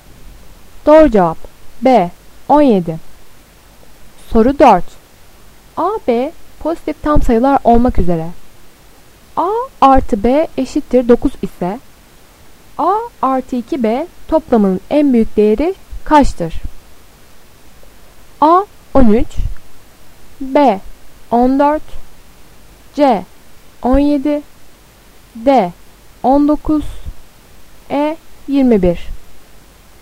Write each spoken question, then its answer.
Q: A artı B eşittir 9 ise A artı 2B toplamının en büyük değeri kaçtır?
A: C 17.